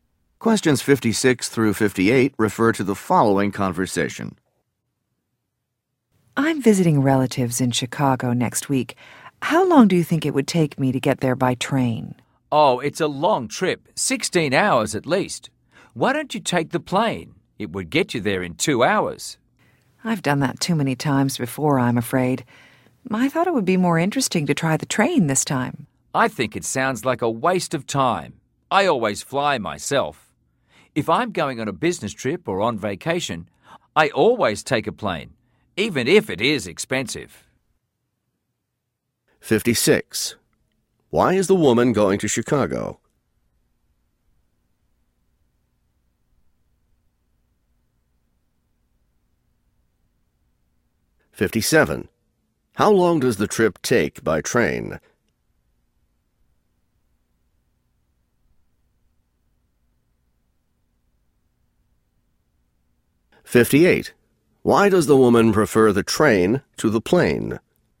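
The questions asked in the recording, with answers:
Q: Why is the woman going to Chicago?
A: To visit relatives

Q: How long does the trip take by train?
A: At least 16 hours

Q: Why does the woman prefer the train to the plane?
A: It would be more interesting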